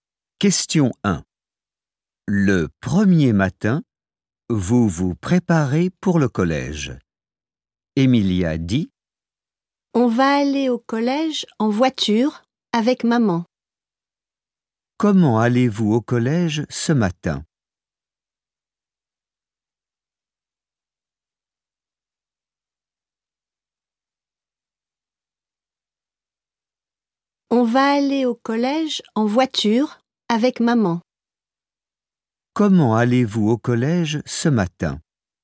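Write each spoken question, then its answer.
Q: Comment allez-vous au collège ce matin ?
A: En voiture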